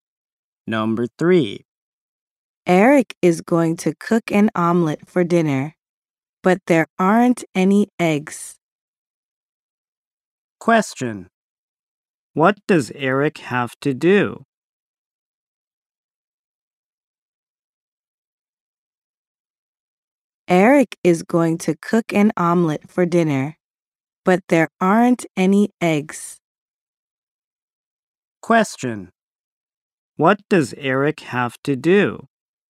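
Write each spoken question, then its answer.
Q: What does Eric have to do?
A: He has to buy some eggs.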